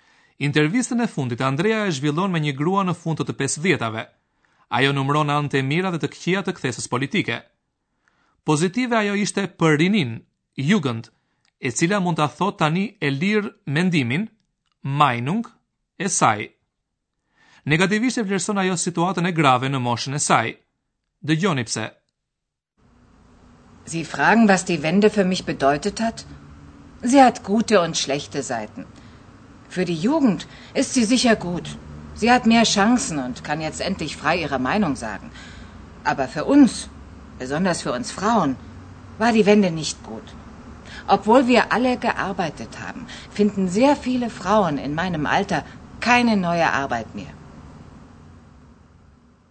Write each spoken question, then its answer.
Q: Dë gjoni pse.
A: Gati të gjitha grat në Republikën Demokratike Gjermane punonin, por sot veçanërisht grat më të moshuara nuk gjejnë më punë të re.